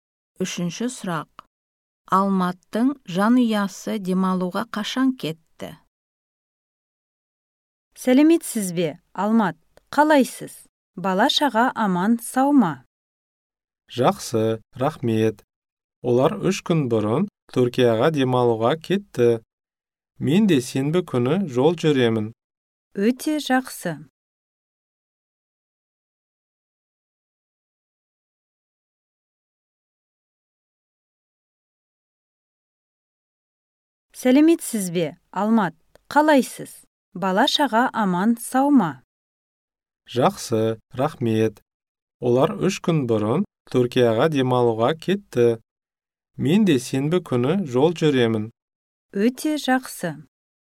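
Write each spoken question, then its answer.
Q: Алматының жанұясы демалуға қашан кетті?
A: Үш күн бұрын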